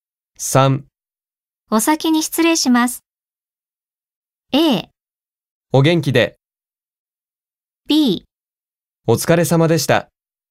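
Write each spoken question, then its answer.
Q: お先に失礼します。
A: B: お疲れ様でした。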